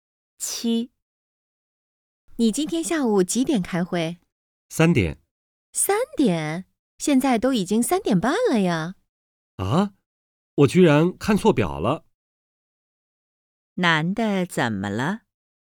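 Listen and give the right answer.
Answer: 他看错表了,开会迟到了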